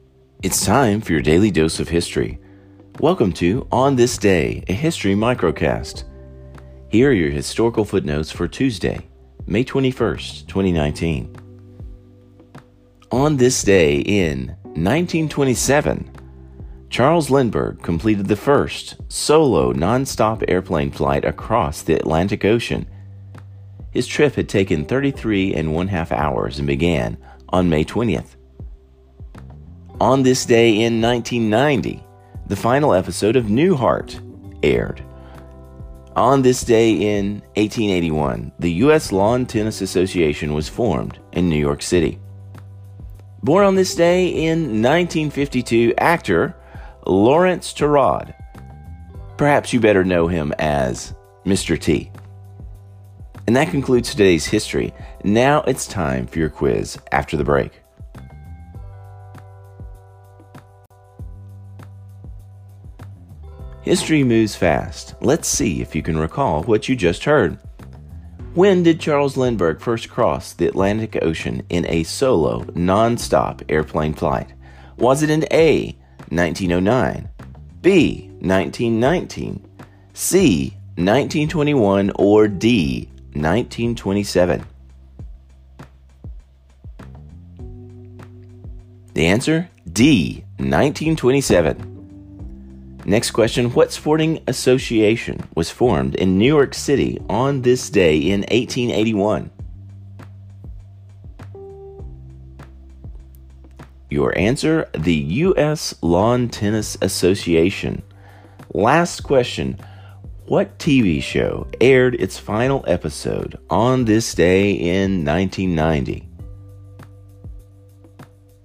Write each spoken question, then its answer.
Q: When did Charles Lindbergh first cross the Atlantic Ocean in a solo, non-stop airplane flight?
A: The answer, D, 1927.

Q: what sporting association was formed in New York City on this day in 1881?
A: Your answer, the U.S. Lawn Tennis Association.

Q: what TV show aired its final episode on this day in 1990?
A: Answer, the Bob Newhart Show, or simply Newhart.